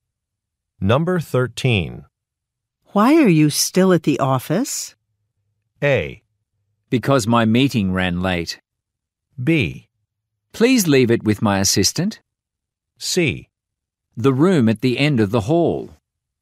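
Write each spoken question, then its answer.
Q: Why are you still at the office?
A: A: Because my meeting ran late.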